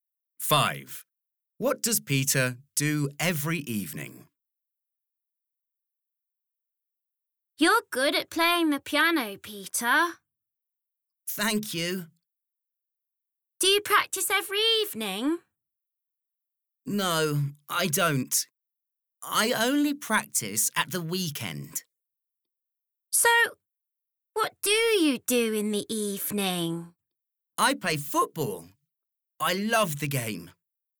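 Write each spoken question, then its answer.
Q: What does Peter do every evening?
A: He plays football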